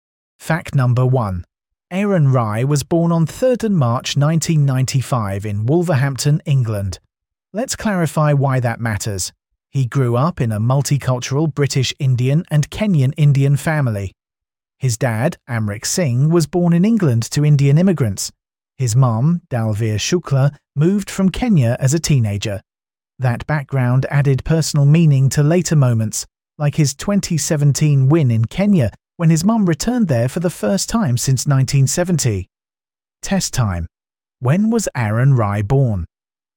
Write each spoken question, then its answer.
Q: When was Aaron Rye born?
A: 3rd March 1995.